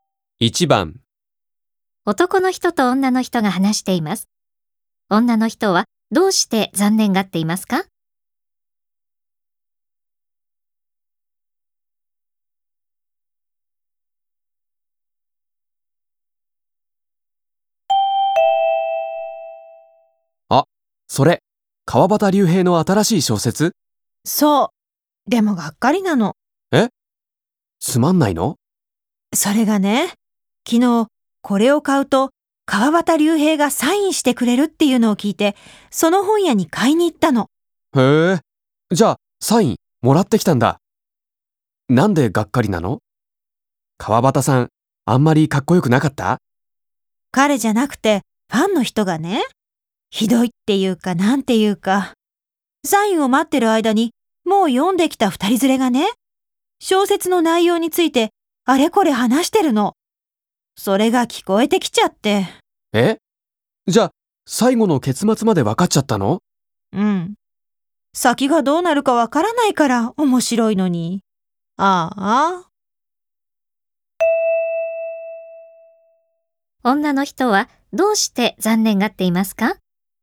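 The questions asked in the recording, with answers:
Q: 女の人はどうして残念がっていますか?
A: サインを待っている間に、他のファンが小説の内容を話しているのが聞こえて、結末が分かってしまったから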